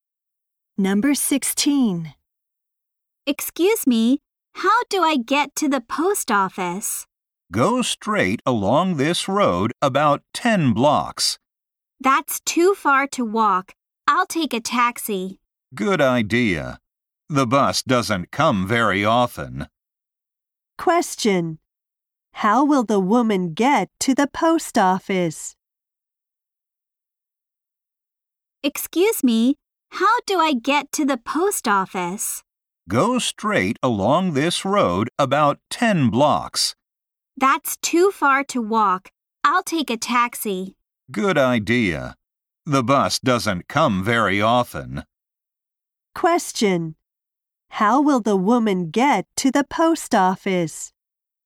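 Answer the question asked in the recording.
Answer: By taxi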